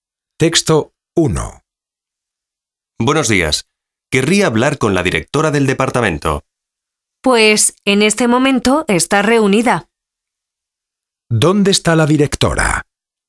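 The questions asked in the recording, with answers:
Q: ¿Dónde está la directora?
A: En una reunión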